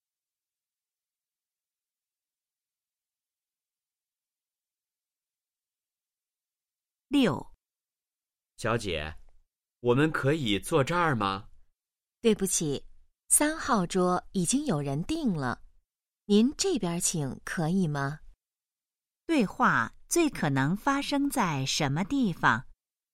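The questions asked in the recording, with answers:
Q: 对话最可能发生在什么地方?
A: 饭店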